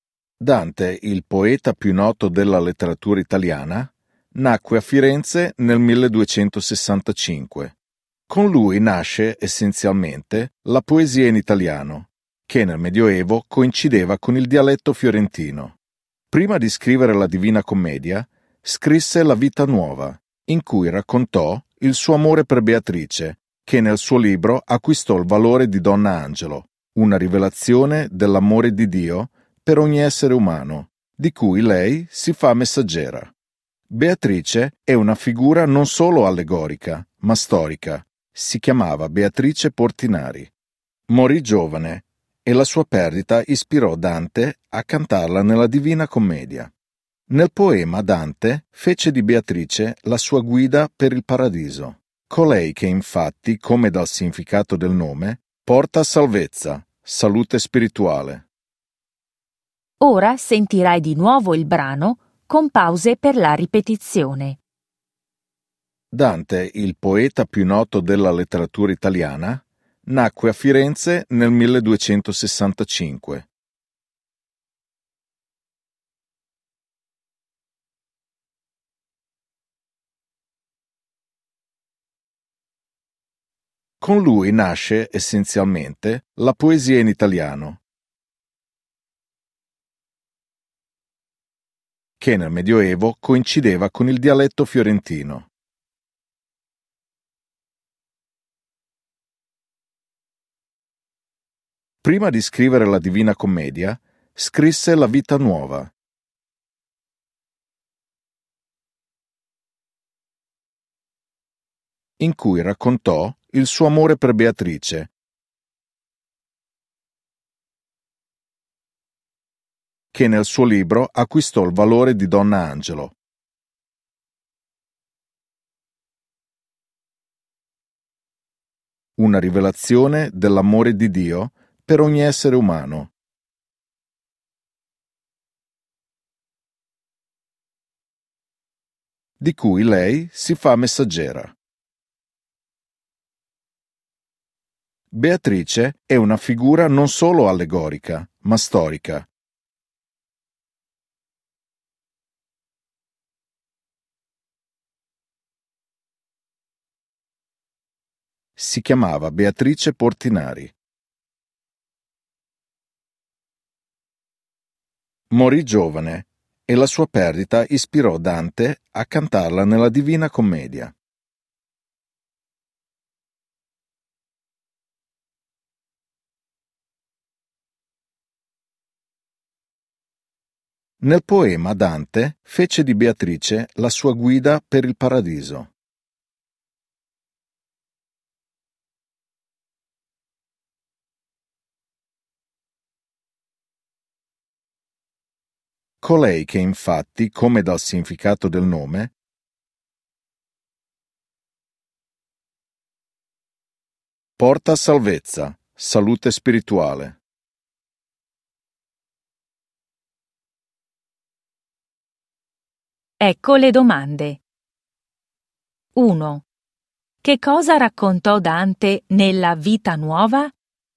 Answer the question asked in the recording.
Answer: Raccontò il suo amore per Beatrice.